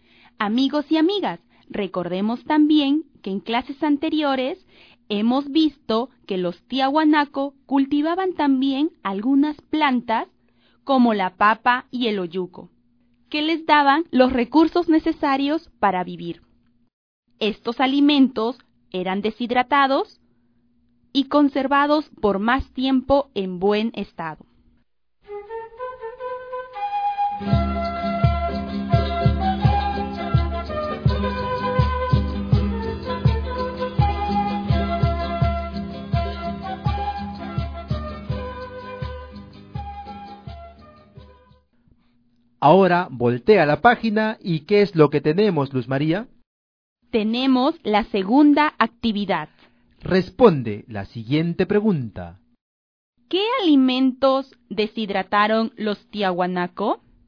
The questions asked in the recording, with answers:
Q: ¿Qué alimentos deshidrataron los Tiahuanaco?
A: la papa, el olluco y la carne de alpaca, que la convirtieron en el charqui, conocida también como la carne seca.